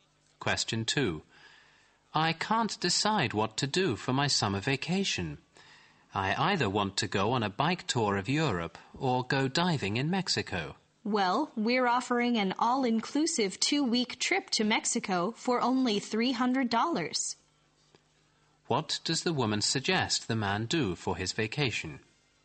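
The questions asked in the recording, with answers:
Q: What does the woman suggest the man do for his vacation?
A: Take the all-inclusive 2-week trip to Mexico for $300.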